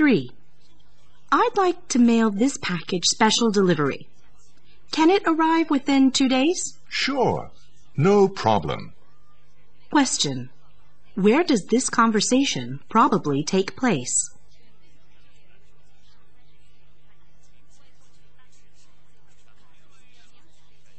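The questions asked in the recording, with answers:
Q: Where does this conversation probably take place?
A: At a post office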